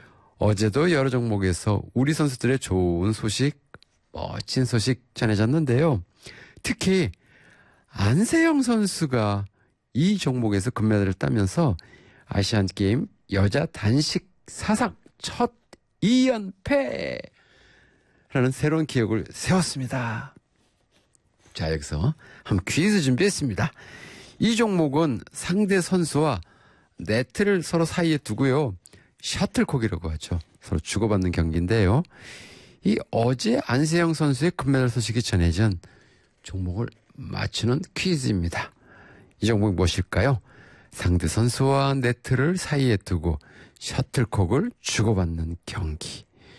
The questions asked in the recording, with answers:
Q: 이 종목이 무엇일까요? 상대 선수와 네트를 사이에 두고 셔틀콕을 주고받는 경기.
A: 2번 배드민턴.